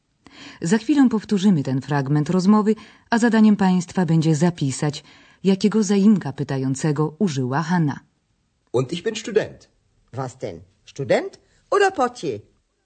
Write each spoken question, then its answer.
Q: zadaniem Państwa będzie zapisać, jakiego zaimka pytającego użyła Hanna.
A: Pokojówka Hanna użyła zaimka pytającego was, po polsku co.